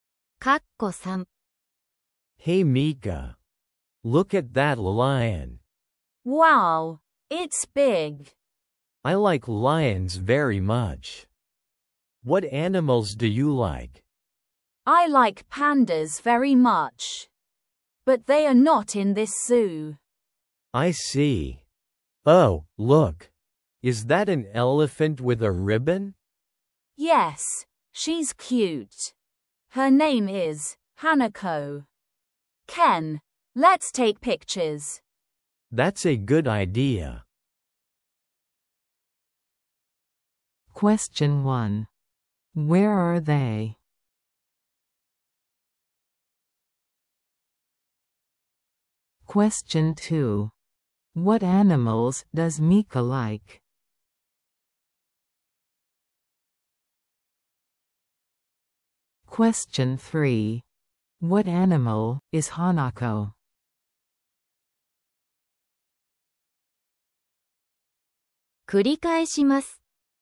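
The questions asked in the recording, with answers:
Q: Where are they?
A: At the zoo

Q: What animals does Mika like?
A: Pandas

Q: What animal is Hanako?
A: An elephant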